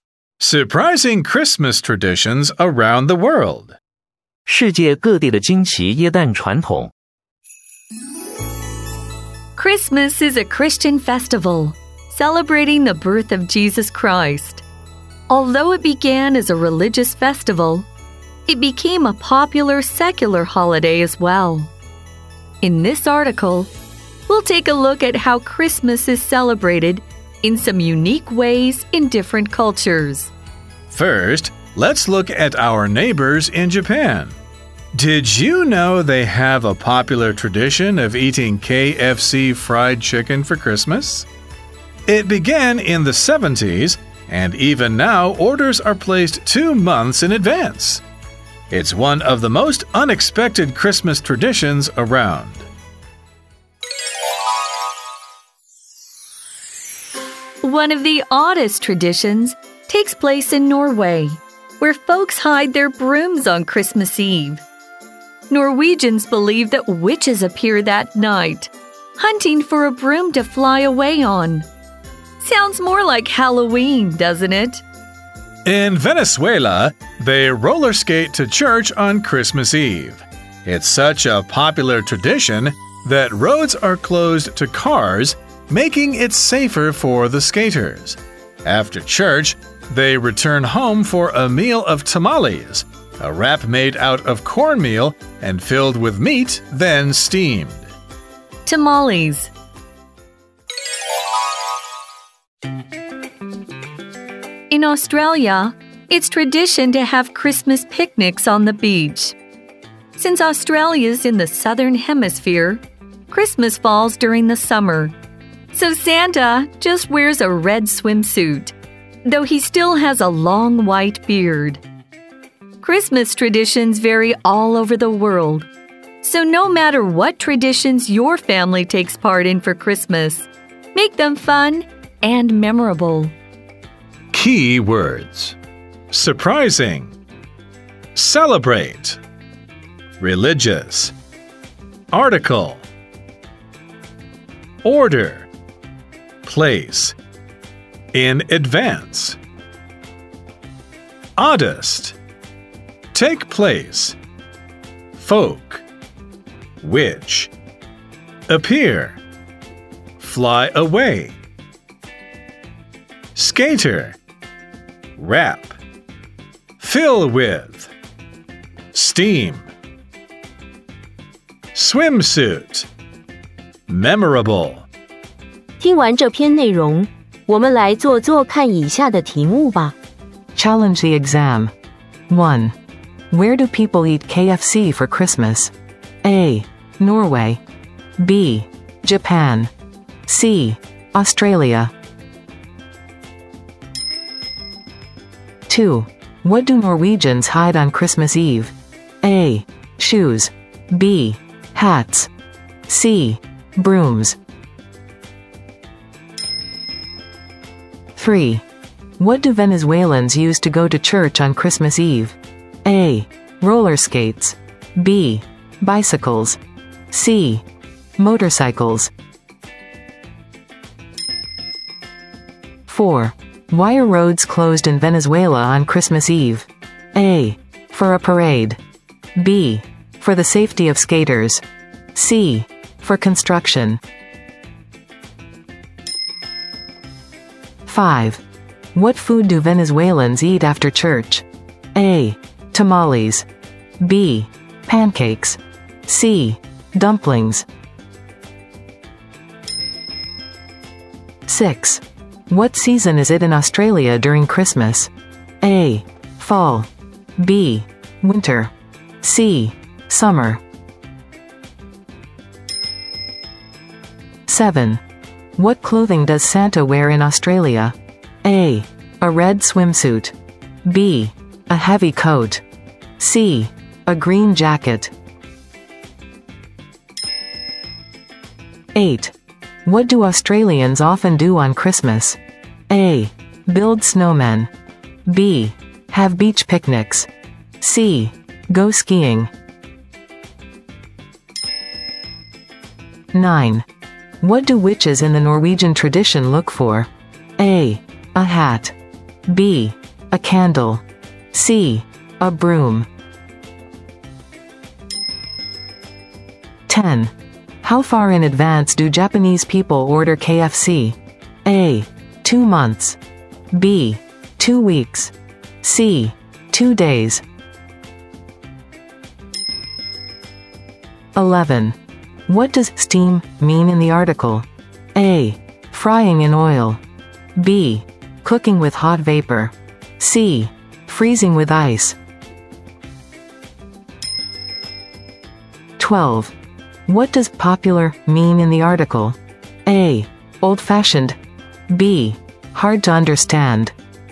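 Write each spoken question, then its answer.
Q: Where do people eat KFC for Christmas?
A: B: Japan.

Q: What do Norwegians hide on Christmas Eve?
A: C: Brooms.

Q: What do Venezuelans use to go to church on Christmas Eve?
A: A: Roller skates.

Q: Why are roads closed in Venezuela on Christmas Eve?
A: B: For the safety of skaters.

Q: What food do Venezuelans eat after church?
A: A: Tamales.

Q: What season is it in Australia during Christmas?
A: C: Summer.

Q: What clothing does Santa wear in Australia?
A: A: A red swimsuit.

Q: What do Australians often do on Christmas?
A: B: Have beach picnics.

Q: What do witches in the Norwegian tradition look for?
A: C: A broom.

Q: How far in advance do Japanese people order KFC?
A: A: 2 months.

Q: What does steam mean in the article?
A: B: Cooking with hot vapor.

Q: What does popular mean in the article?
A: C: Liked by many people.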